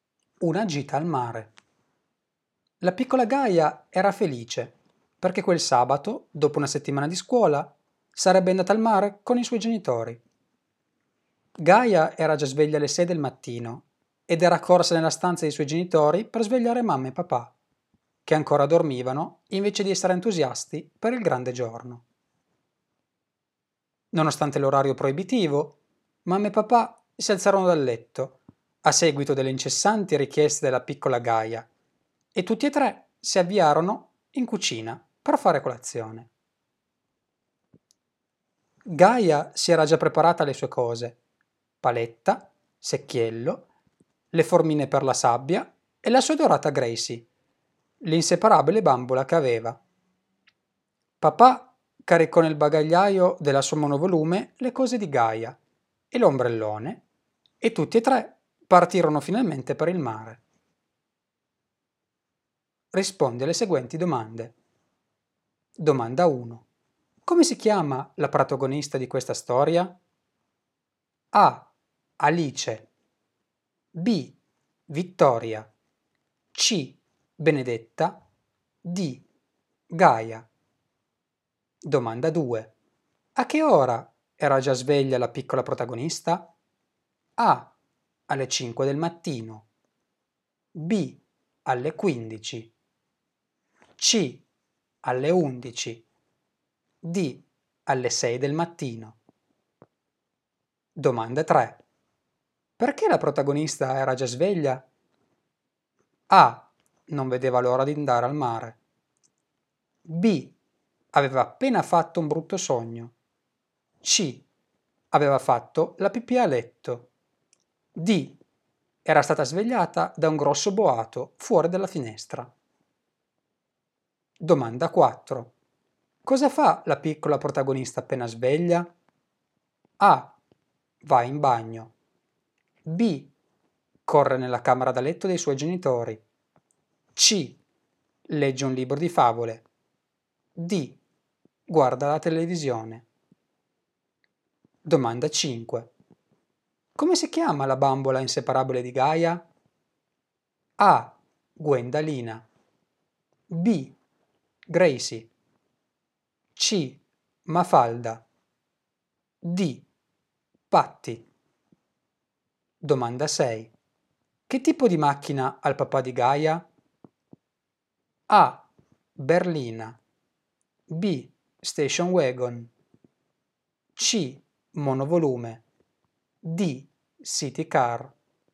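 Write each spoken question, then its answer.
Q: Come si chiama la protagonista di questa storia?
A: D: Gaia

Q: A che ora era già sveglia la piccola protagonista?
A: D: Alle 6 del mattino

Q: Perché la protagonista era già sveglia?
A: A: Non vedeva l'ora di andare al mare

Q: Cosa fa la piccola protagonista appena sveglia?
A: B: Corre nella camera da letto dei suoi genitori

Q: Come si chiama la bambola inseparabile di Gaia?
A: B: Gracie

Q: Che tipo di macchina ha il papà di Gaia?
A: C: Monovolume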